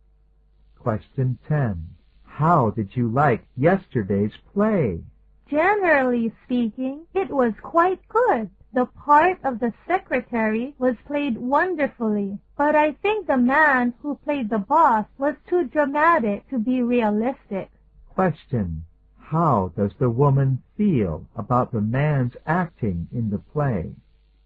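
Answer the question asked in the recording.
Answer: He was too dramatic to be realistic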